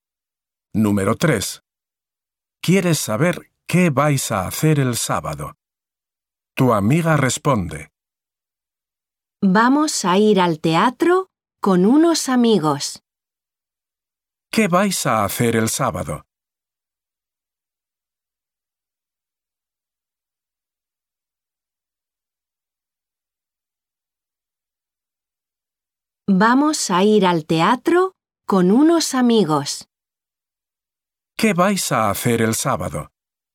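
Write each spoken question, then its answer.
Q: ¿Qué vais a hacer el sábado?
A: Ir al teatro con unos amigos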